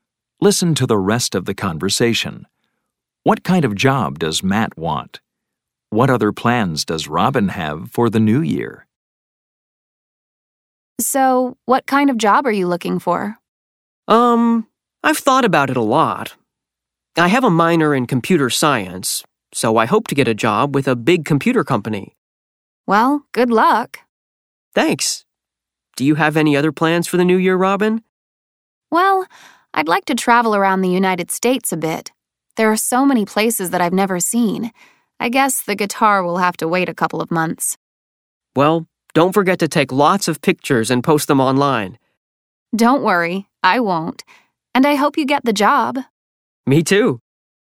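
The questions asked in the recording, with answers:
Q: What kind of job does Matt want?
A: A job with a big computer company

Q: What other plans does Robin have for the new year?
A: To travel around the United States a bit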